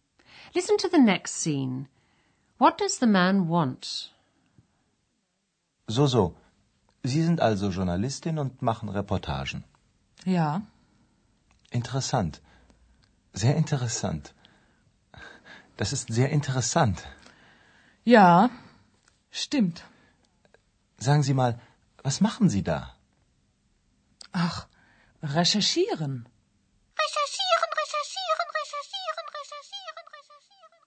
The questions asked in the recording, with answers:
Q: What does the man want?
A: The young man wanted to get into conversation with a young woman, but she wasn't very keen to talk.